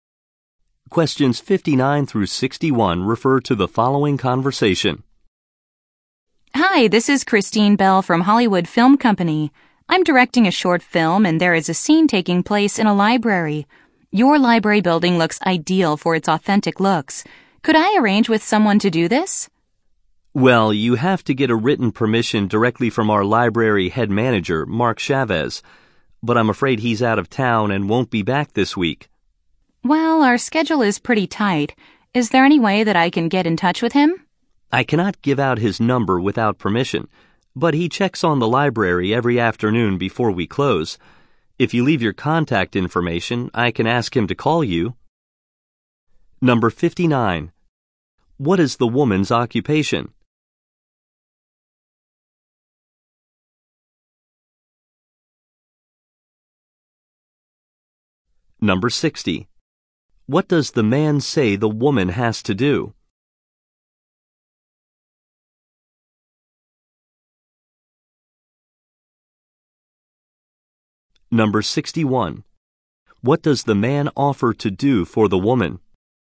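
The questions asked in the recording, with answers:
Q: What is the woman's occupation?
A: Film director.

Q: What does the man say the woman has to do?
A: Get written permission from the library head manager.

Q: What does the man offer to do for the woman?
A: Ask the manager to call her.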